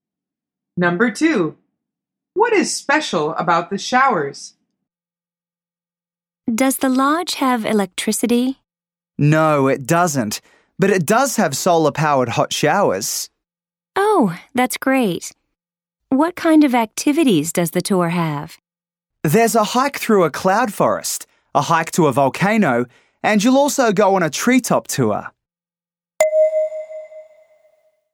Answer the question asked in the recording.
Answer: The answer is they are solar powered.